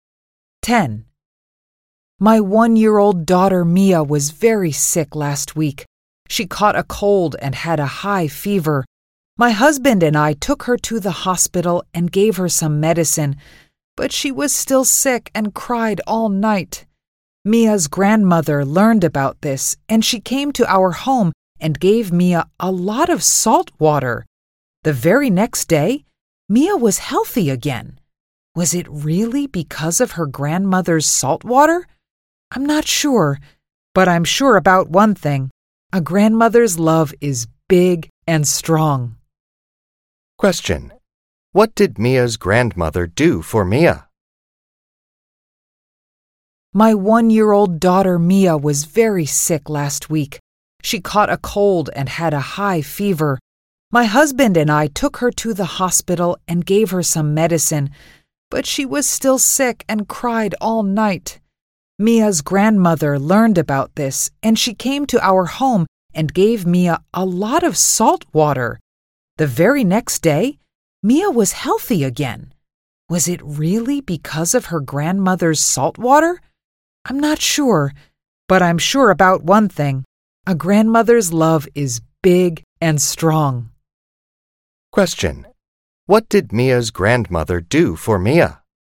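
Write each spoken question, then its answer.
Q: What did Mia's grandmother do for Mia?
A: She gave Mia a lot of salt water.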